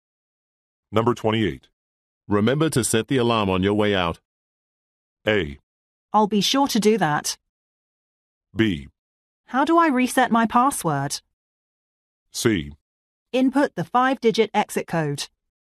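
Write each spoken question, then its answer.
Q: Remember to set the alarm on your way out.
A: A: I'll be sure to do that.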